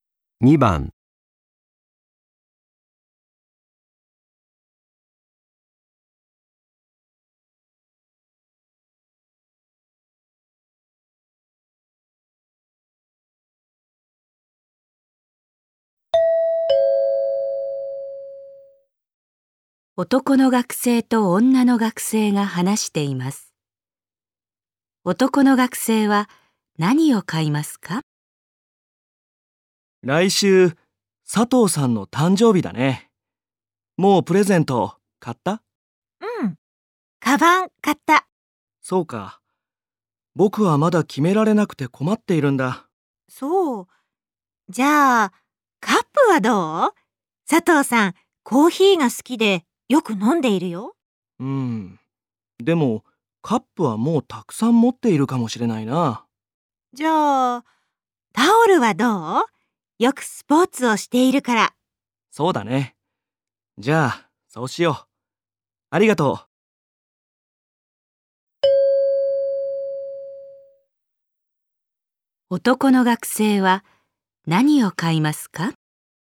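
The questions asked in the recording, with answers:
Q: 男の学生は何を買いますか?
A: タオル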